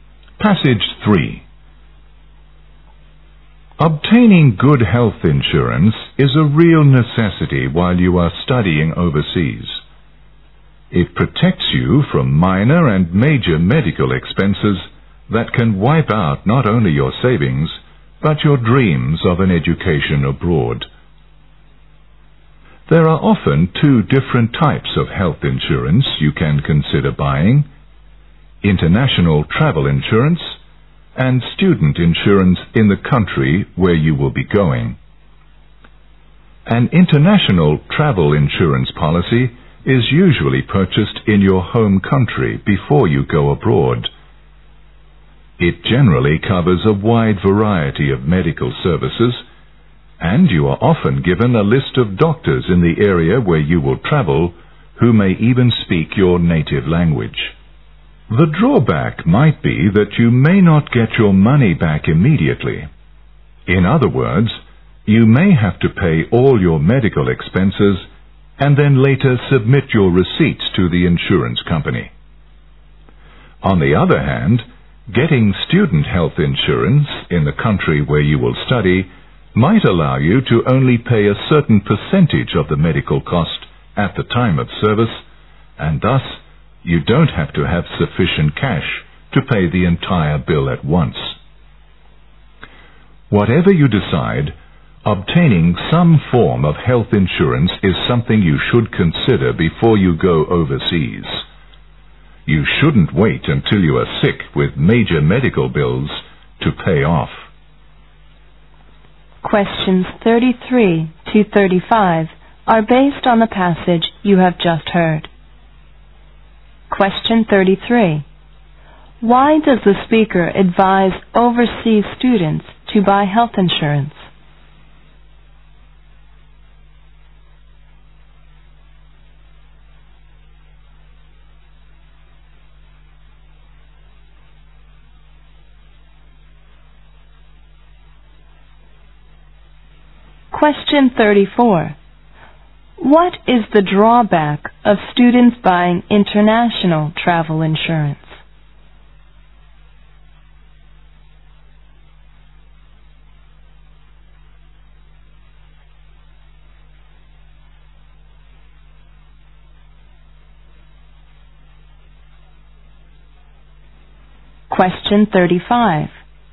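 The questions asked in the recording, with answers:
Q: Why does the speaker advise overseas students to buy health insurance?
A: To protect them from medical expenses that could wipe out their savings

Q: What is the drawback of students buying international travel insurance?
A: They may not get their money back immediately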